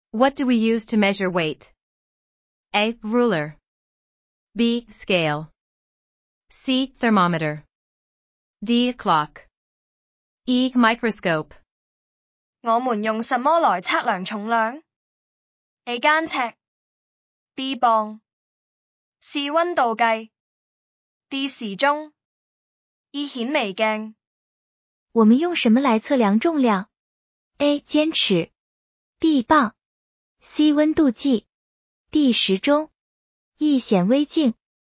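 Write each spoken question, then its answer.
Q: What do we use to measure weight?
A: B: Scale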